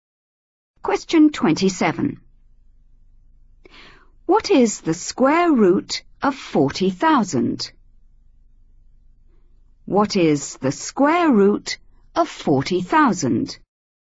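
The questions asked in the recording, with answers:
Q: What is the square root of 40,000?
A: 200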